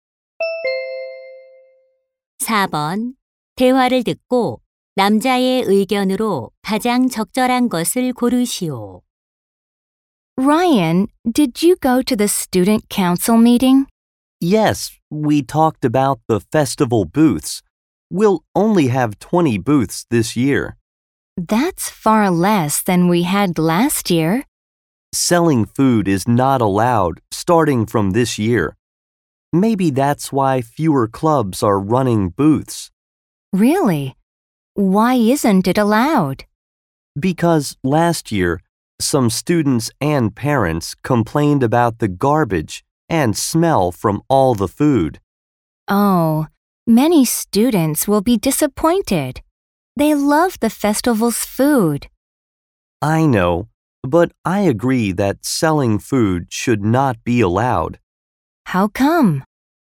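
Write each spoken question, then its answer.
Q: 대화를 듣고 남자의 의견으로 가장 적절한 것을 고르시오.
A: 학교 축제에서 음식 판매를 허용해서는 안 된다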